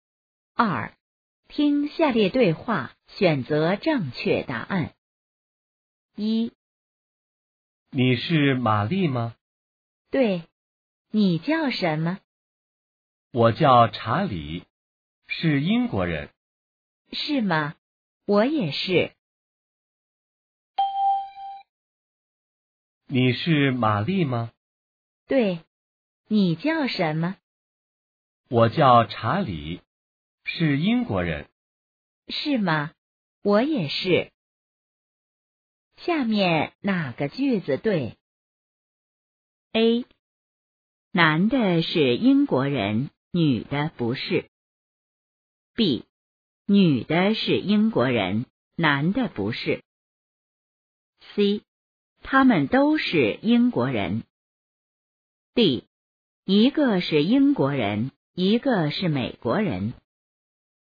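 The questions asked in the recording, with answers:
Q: 下面哪个句子对?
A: C: 他们都是英国人。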